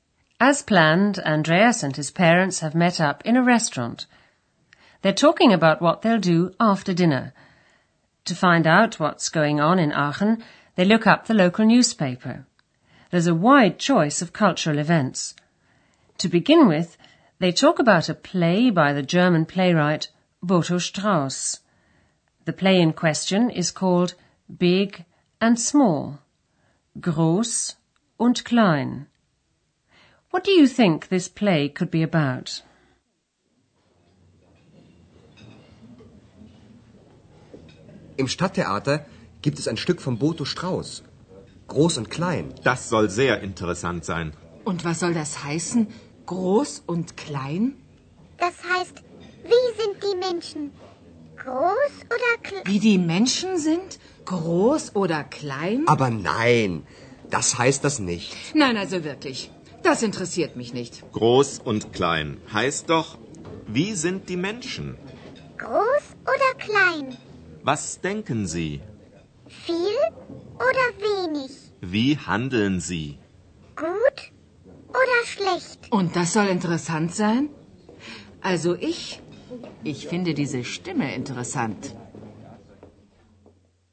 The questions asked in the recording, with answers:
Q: What do you think this play could be about?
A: Herr Schäfer thinks that the title of the play, Big and Small, refers to people's characters.